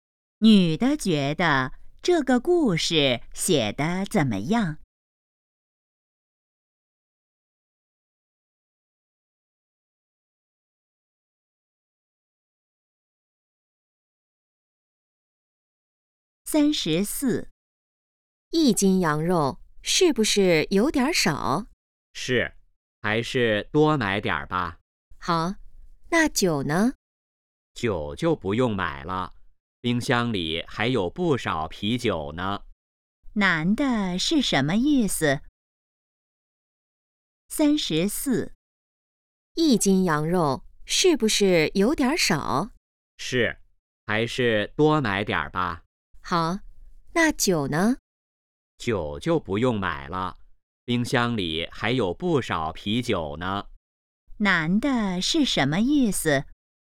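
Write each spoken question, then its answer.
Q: 男的是什么意思?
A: 不用买酒了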